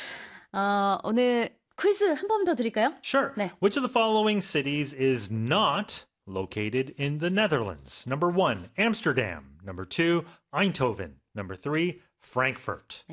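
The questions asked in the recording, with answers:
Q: Which of the following cities is not located in the Netherlands?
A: 3: Frankfurt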